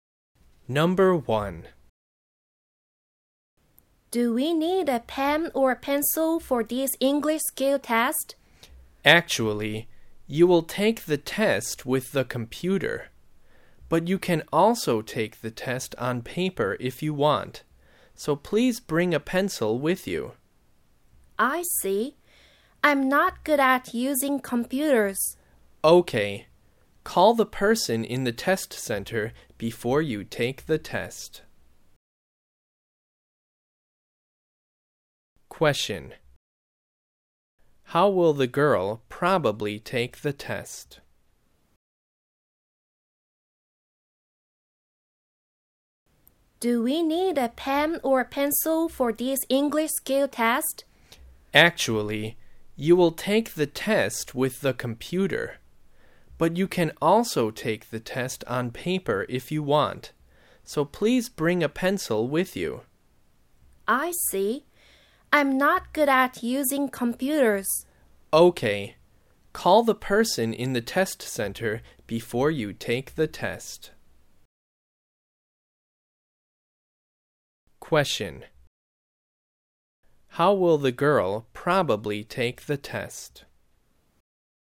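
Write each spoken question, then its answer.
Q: How will the girl probably take the test?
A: On paper, with a pencil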